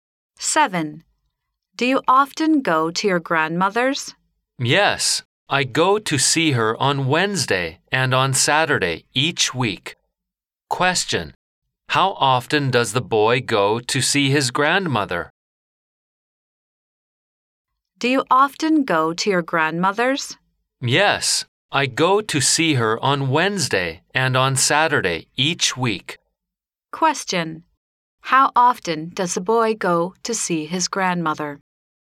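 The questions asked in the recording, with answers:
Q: how often does the boy go to see his grandmother?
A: Twice a week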